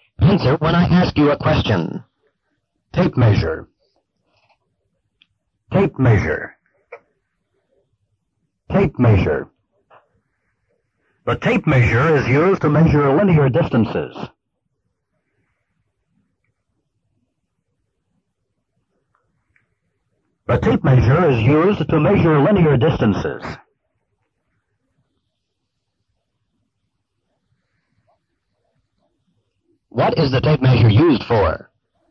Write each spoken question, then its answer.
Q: What is the tape measure used for?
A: A tape measure is used to measure linear distances.